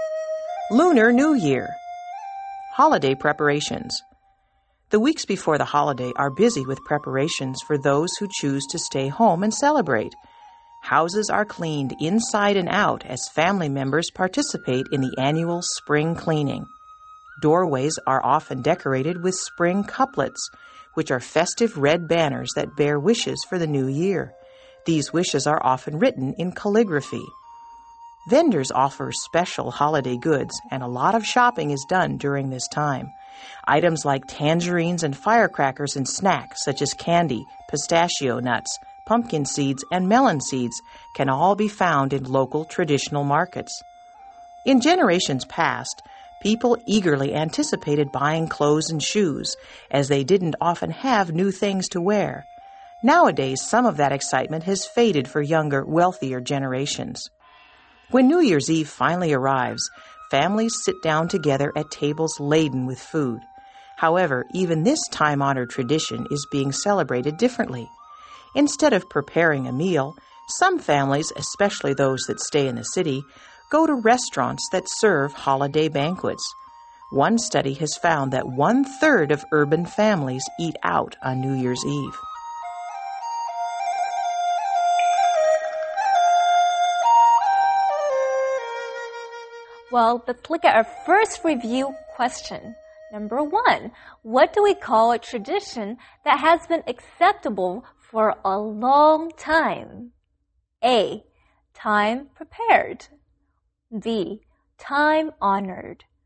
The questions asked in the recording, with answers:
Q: what do we call a tradition that has been acceptable for a long time?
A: The answer is B, time honored.